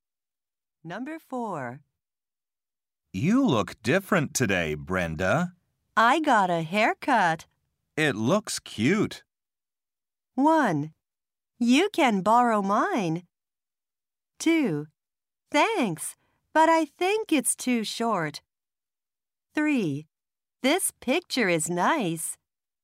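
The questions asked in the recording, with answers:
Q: It looks cute.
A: 2: Thanks, but I think it's too short.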